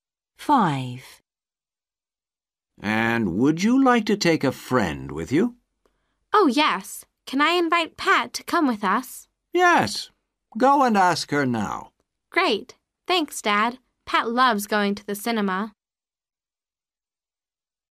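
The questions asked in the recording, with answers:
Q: And would you like to take a friend with you?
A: yes, Pat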